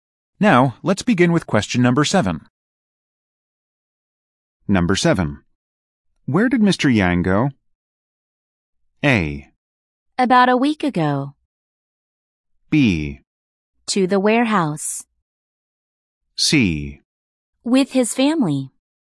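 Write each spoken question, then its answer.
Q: Where did Mr. Yang go?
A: B: To the warehouse.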